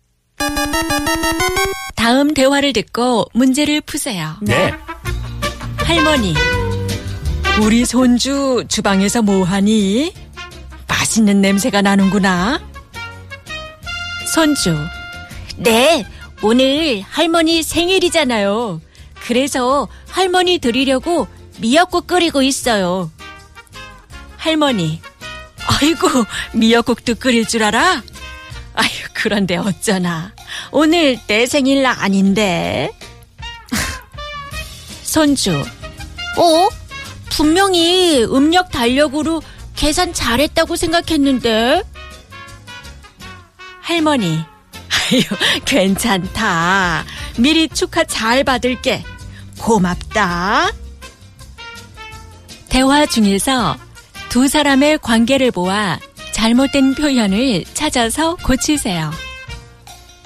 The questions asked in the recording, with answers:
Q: 대화 중에서 두 사람의 관계를 보아 잘못된 표현을 찾아서 고치세요.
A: So it was Sengil.